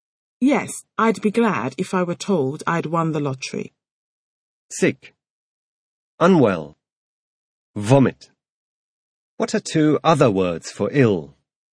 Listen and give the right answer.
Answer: Two other words for ill are sick and unwell.